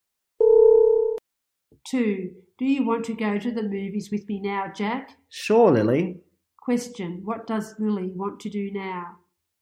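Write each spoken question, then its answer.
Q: What does Lily want to do now?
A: Go to the movies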